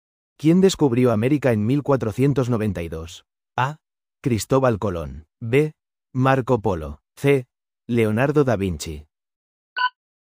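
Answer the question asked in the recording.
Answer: A: Cristóbal Colón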